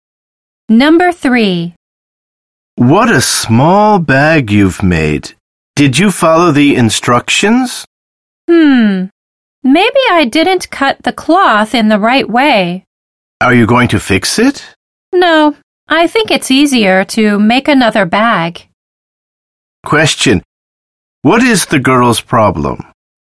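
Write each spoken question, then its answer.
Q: What is the girl's problem?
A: The bag she made is too small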